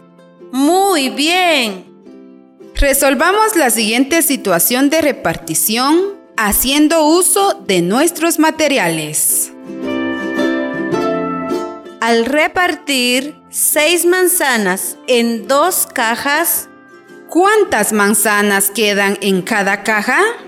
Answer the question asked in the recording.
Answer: Tres. Muy bien, tres manzanas.